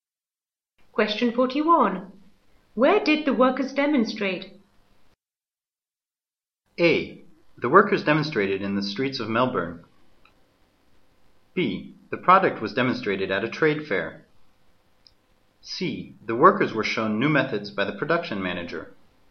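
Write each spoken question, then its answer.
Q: Where did the workers demonstrate?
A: A: The workers demonstrated in the streets of Melbourne.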